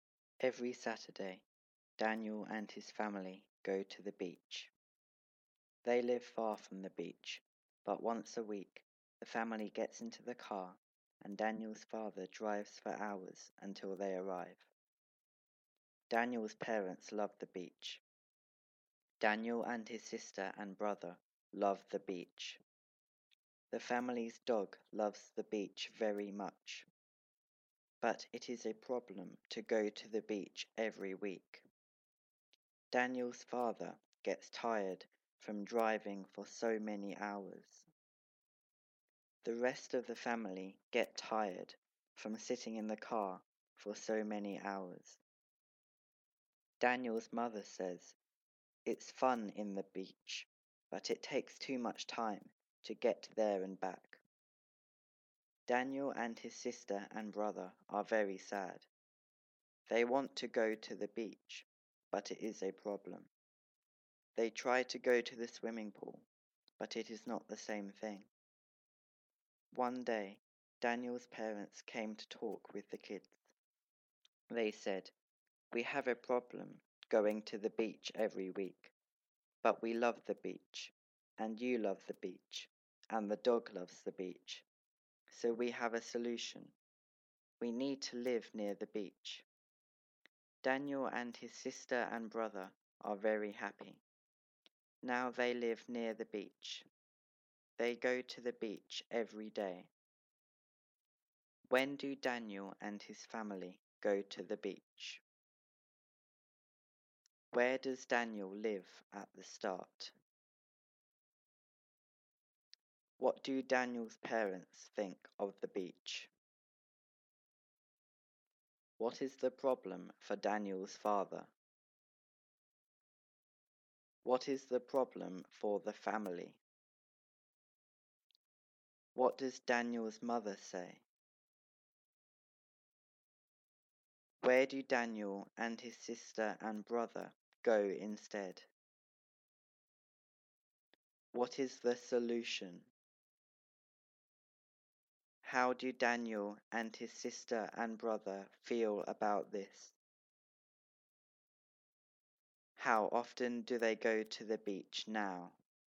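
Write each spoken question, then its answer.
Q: When do Daniel and his family go to the beach?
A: Every Saturday

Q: Where does Daniel live at the start?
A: Far from the beach

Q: What do Daniel's parents think of the beach?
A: They love the beach

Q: What is the problem for Daniel's father?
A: He gets tired from driving for so many hours

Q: What is the problem for the family?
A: They get tired from sitting in the car for so many hours

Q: What does Daniel's mother say?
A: It's fun at the beach, but it takes too much time to get there and back

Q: Where do Daniel and his sister and brother go instead?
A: To the swimming pool

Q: What is the solution?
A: To live near the beach

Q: How do Daniel and his sister and brother feel about this?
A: Very happy

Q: How often do they go to the beach now?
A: Every day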